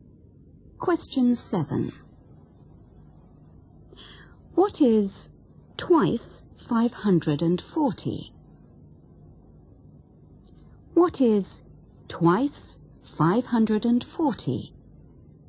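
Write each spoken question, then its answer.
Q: What is twice 540?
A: 1080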